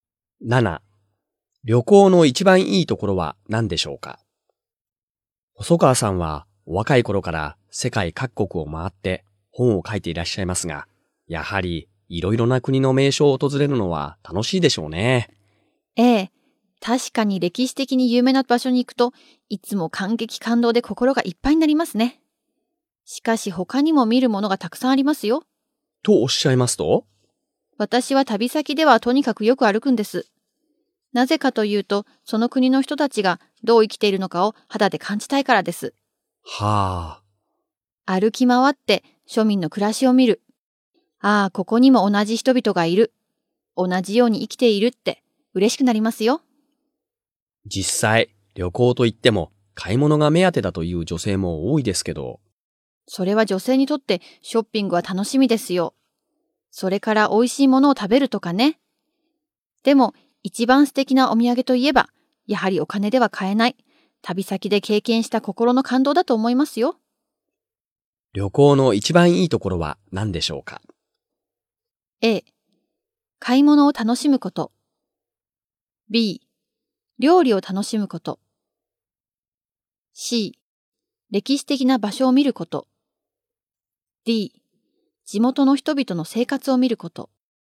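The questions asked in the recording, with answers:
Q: 旅行の一番いいところは何でしょうか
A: D: 地元の人々の生活を見ること。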